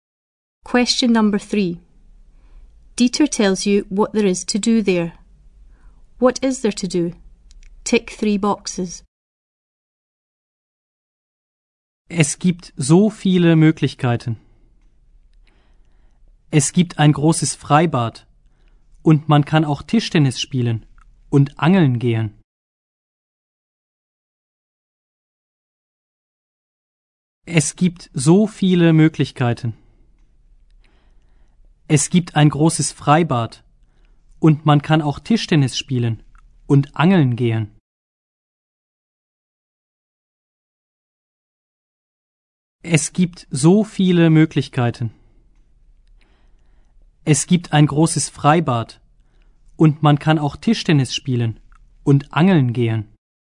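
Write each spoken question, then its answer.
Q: What is there to do?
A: Open-air swimming pool, table tennis, fishing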